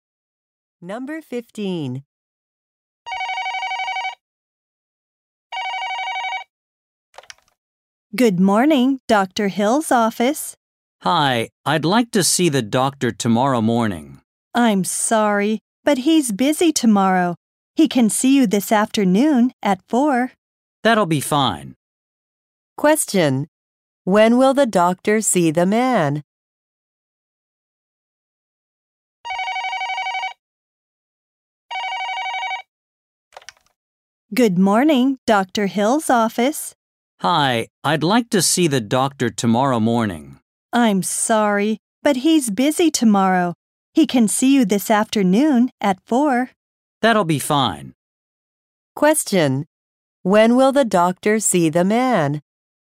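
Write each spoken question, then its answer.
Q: When will the doctor see the man?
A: This afternoon at 4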